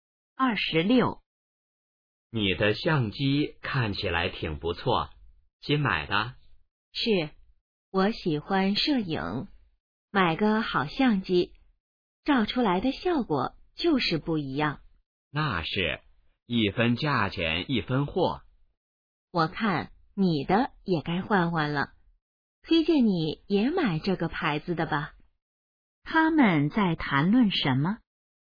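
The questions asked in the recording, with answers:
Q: 他们在谈论什么?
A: 相机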